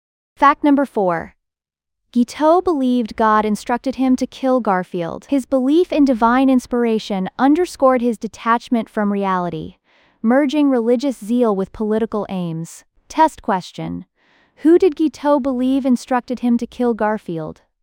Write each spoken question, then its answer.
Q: Who did Guiteau believe instructed him to kill Garfield?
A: Correct answer, God.